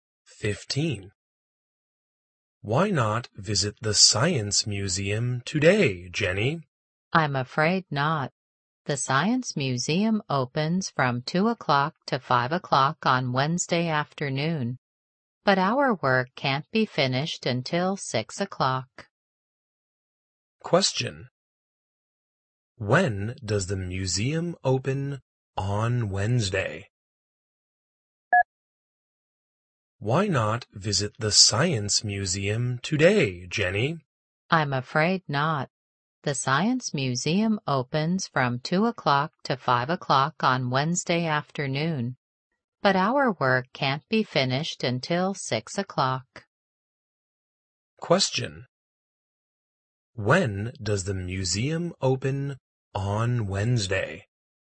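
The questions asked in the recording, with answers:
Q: When does the museum open on Wednesday?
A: From 2 o'clock to 5 o'clock on Wednesday afternoon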